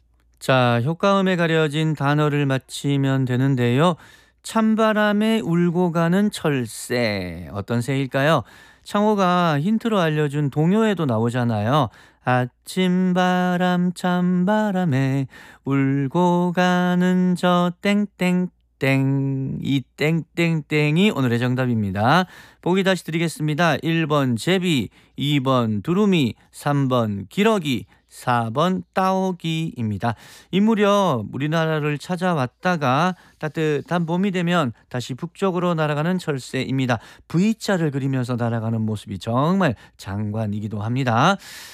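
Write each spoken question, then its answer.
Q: 찬바람에 울고 가는 철새, 어떤 새일까요?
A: 3번: 기러기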